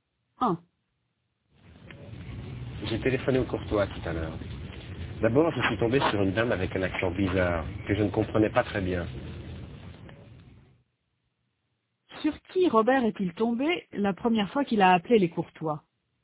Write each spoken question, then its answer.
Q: Sur qui Robert est-il tombé la première fois qu'il a appelé les Courtois?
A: Sur une dame avec un accent bizarre.